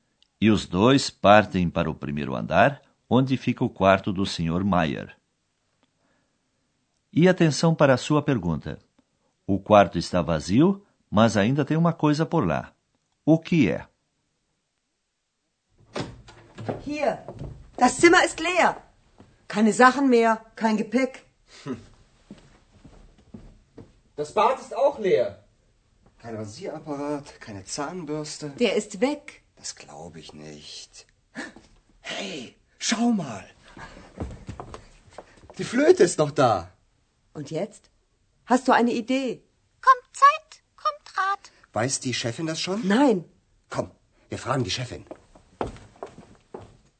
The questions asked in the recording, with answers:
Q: O quarto está vazio, mas ainda tem uma coisa por lá.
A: É, meus amigos, a única coisa que sobrou no quarto do Sr.